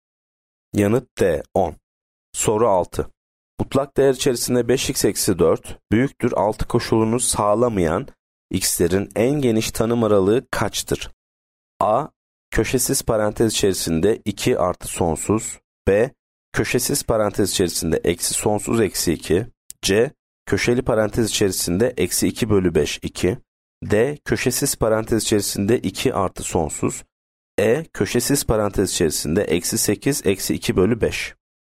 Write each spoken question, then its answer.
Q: Mutlak değer içerisinde 5x eksi 4 büyüktür 6 koşulunu sağlamayan x'lerin en geniş tanım aralığı kaçtır?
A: Yanıt C. Köşeli parantez içerisinde eksi 2 bölü 5 2.